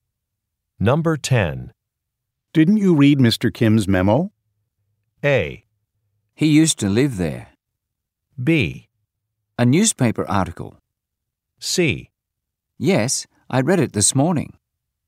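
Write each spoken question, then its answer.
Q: Didn't you read Mr. Kim's memo?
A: C: Yes, I read it this morning.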